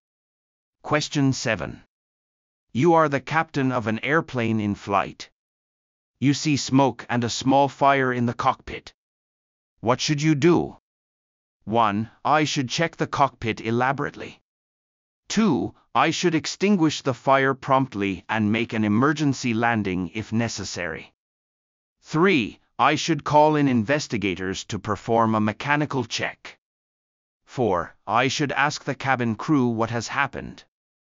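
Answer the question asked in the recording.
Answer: 2: I should extinguish the fire promptly and make an emergency landing if necessary.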